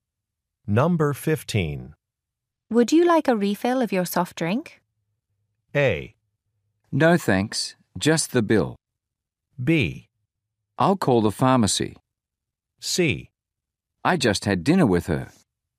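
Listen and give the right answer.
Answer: A: No thanks, just the bill.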